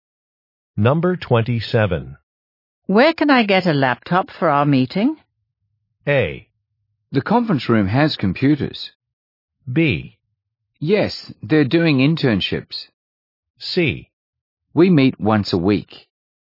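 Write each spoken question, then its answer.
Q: Where can I get a laptop for our meeting?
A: A: The conference room has computers.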